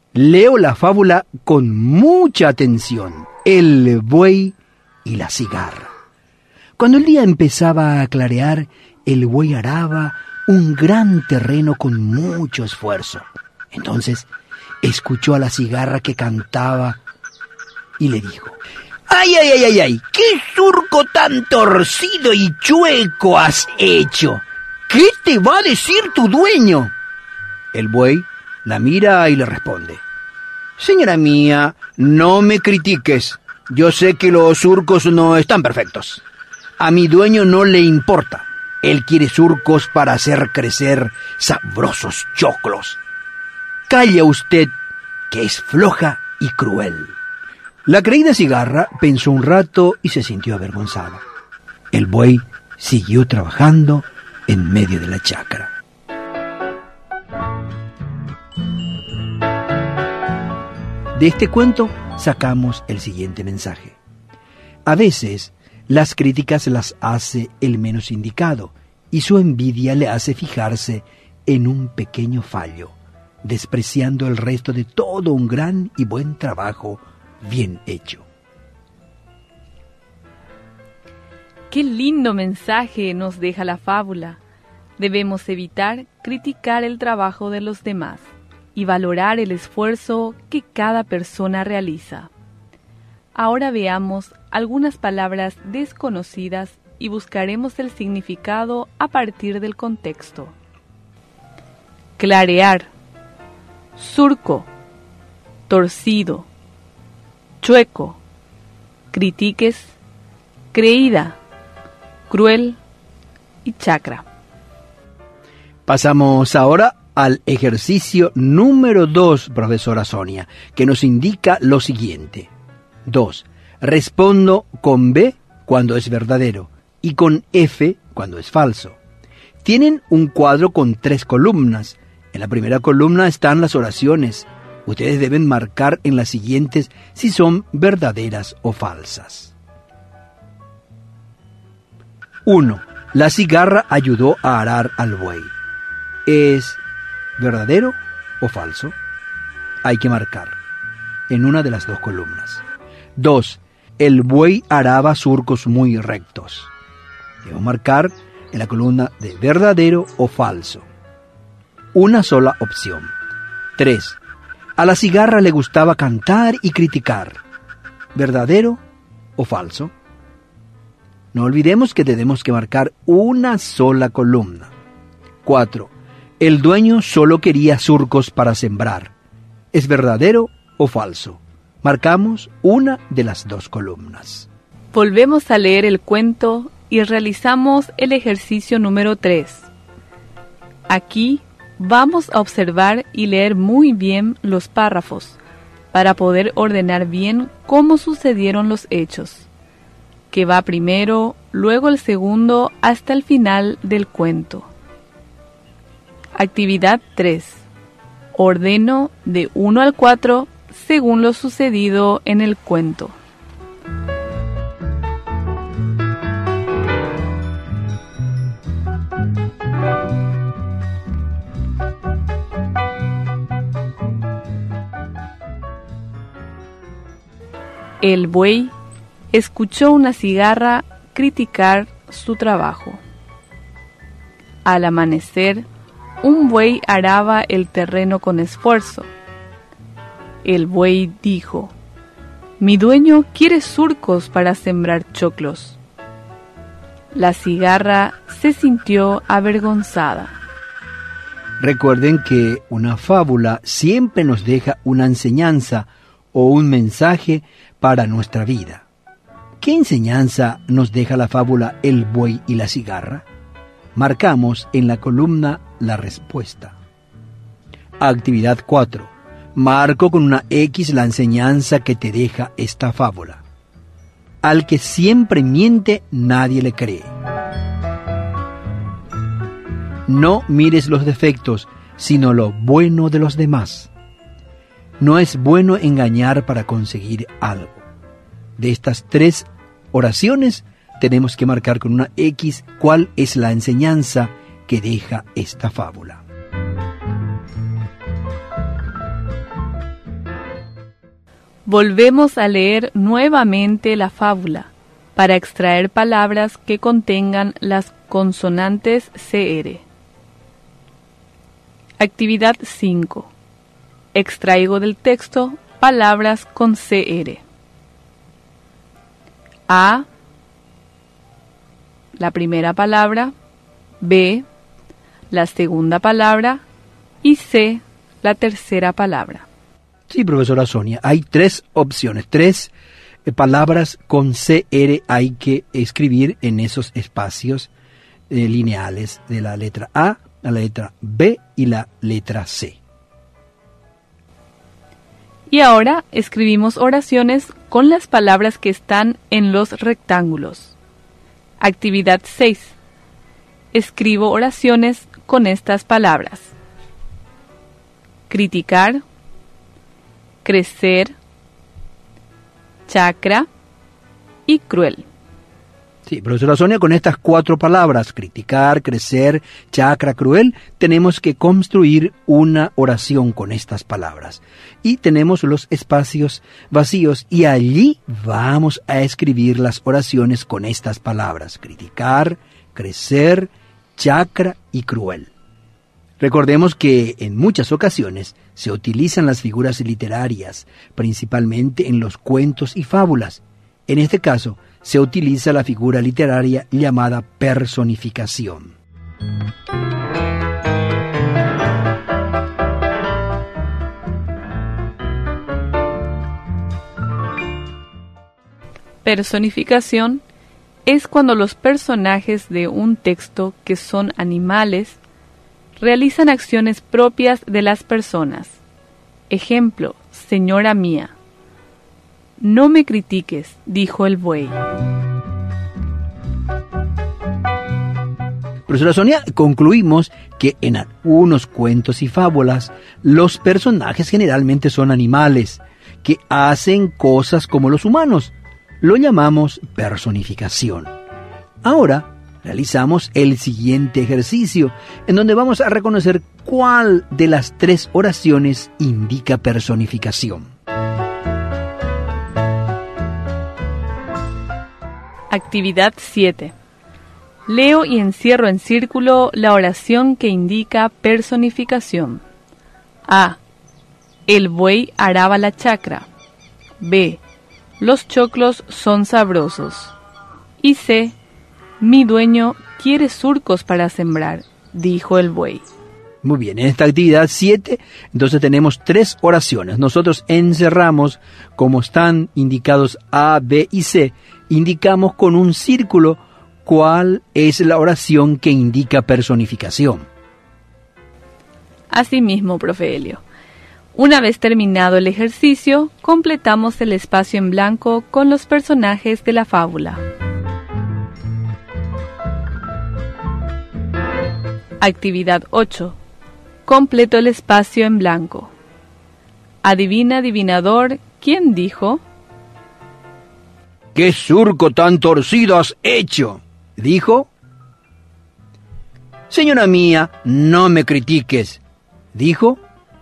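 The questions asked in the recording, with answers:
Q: La cigarra ayudó a arar al buey.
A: Falso

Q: El buey araba surcos muy rectos.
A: Falso

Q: A la cigarra le gustaba cantar y criticar.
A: Verdadero

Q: El dueño solo quería surcos para sembrar.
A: Verdadero

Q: Actividad 4. Marco con una X la enseñanza que te deja esta fábula.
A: No mires los defectos, sino lo bueno de los demás.

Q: Actividad 7. Leo y encierro en círculo la oración que indica personificación.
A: C: Mi dueño quiere surcos para sembrar, dijo el buey.

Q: ¿Qué surco tan torcido has hecho?, dijo.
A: la cigarra

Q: Señora mía, no me critiques, dijo.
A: el buey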